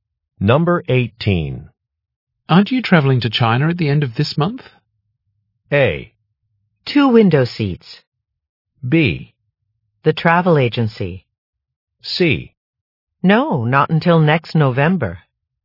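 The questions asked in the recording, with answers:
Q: Aren't you traveling to China at the end of this month?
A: C: No, not until next November.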